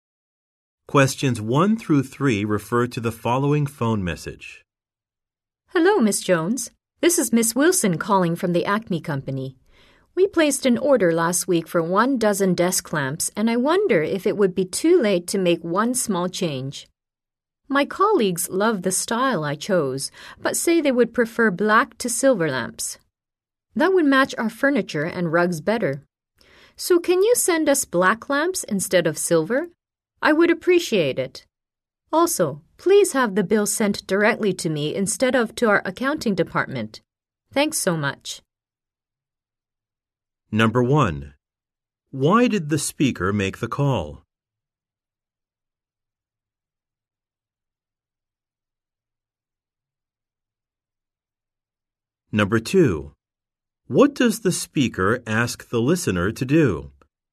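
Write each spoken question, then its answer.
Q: Why did the speaker make the call?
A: To change an order

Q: What does the speaker ask the listener to do?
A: Send black lamps instead of silver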